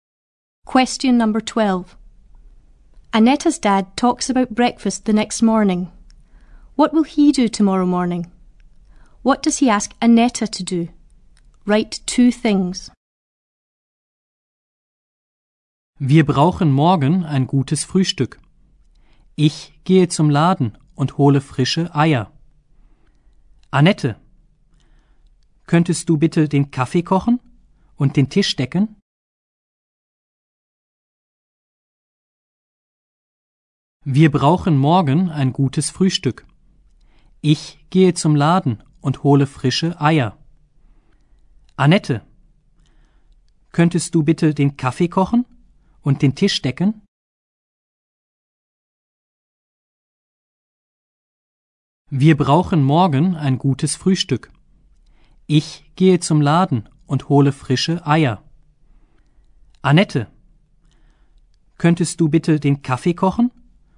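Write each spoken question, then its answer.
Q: What will he do tomorrow morning?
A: Go to the shop to get fresh eggs

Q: What does he ask Annetta to do?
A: Make the coffee and set the table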